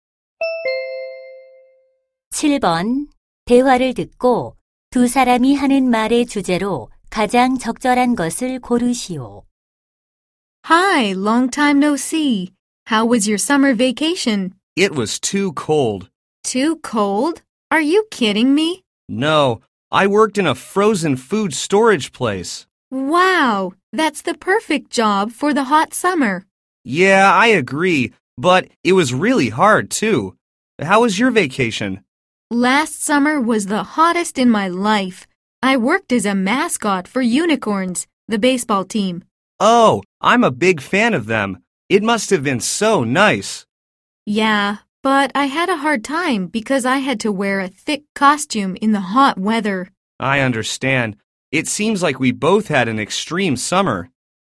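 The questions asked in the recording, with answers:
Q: 대화를 듣고 두 사람이 하는 말의 주제로 가장 적절한 것을 고르시오.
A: 힘들었던 여름방학 아르바이트 경험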